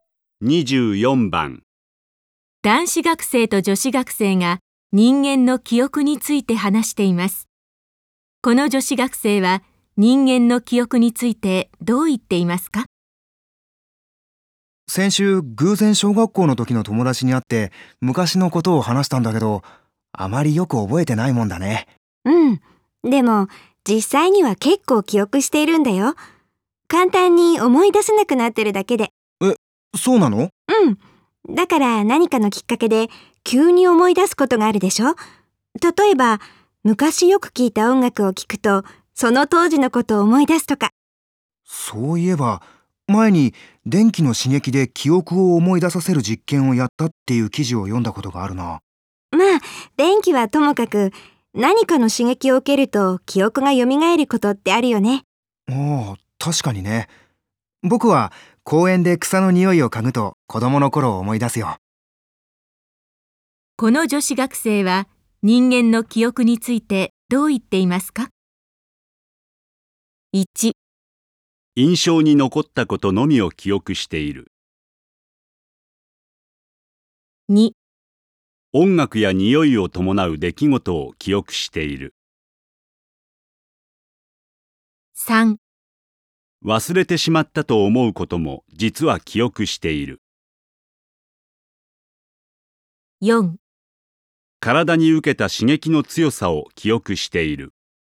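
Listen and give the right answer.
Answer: 3: 忘れてしまったと思うことも実は記憶している。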